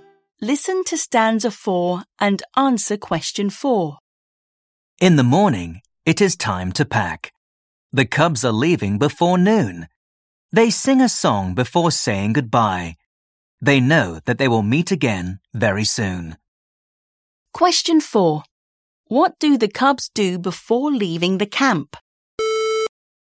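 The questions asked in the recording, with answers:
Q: What do the cubs do before leaving the camp?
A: They sing a song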